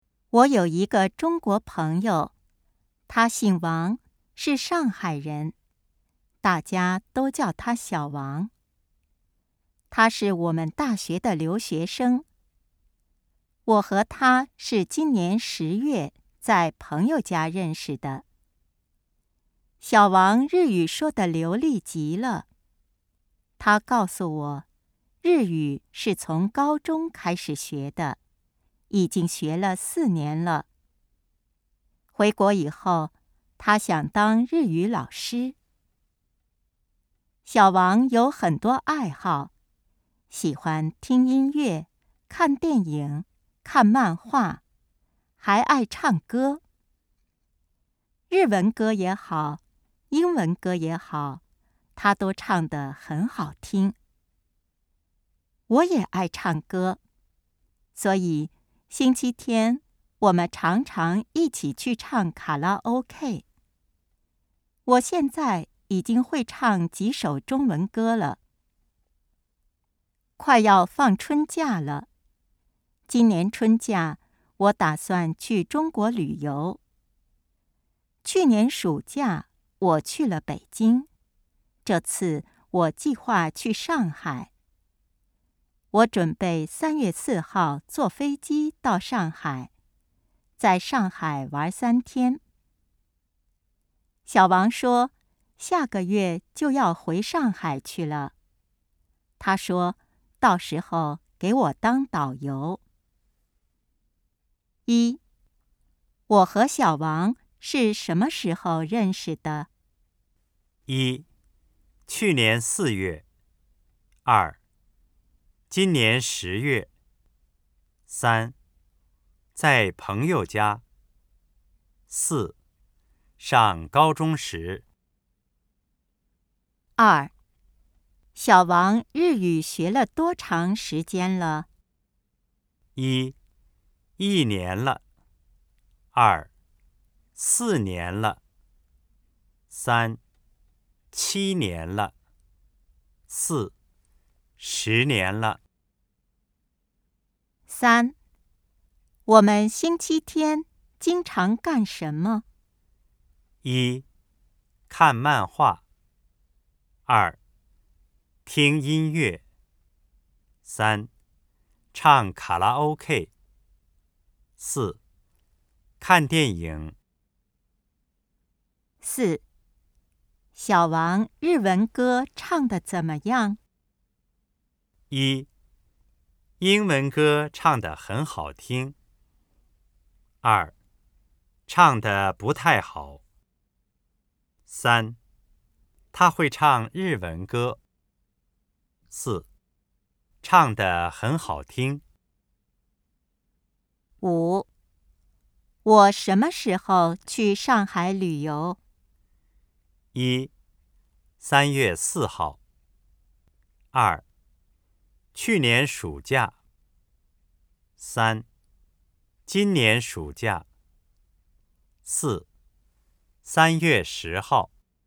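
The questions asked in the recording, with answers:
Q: 我和小王是什么时候认识的?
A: 二: 今年十月

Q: 小王日语学了多长时间了?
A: 二: 四年了

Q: 我们星期天经常干什么?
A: 三: 唱卡拉 OK

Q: 小王日文歌唱得怎么样?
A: 四: 唱得很好听

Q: 我什么时候去上海旅游?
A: 一: 三月四号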